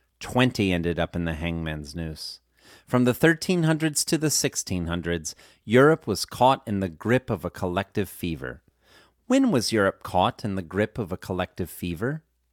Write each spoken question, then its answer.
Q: When was Europe caught in the grip of a collective fever?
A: Europe was caught in the grip of a collective fever from the 1300s to the 1600s.